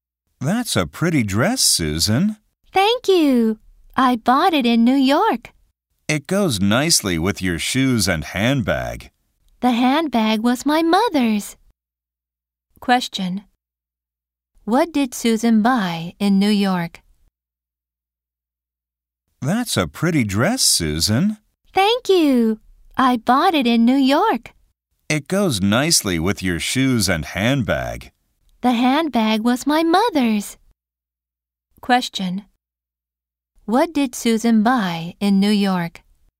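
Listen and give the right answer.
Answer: A dress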